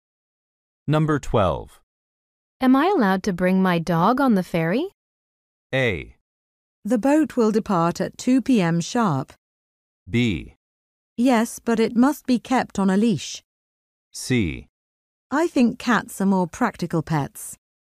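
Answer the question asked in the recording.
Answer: B: Yes, but it must be kept on a leash.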